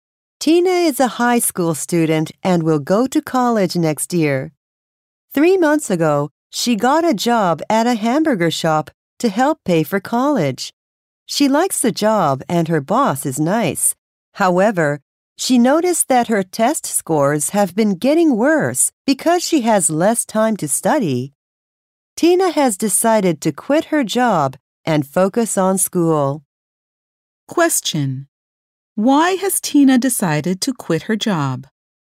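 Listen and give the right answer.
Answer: Her test scores have been getting worse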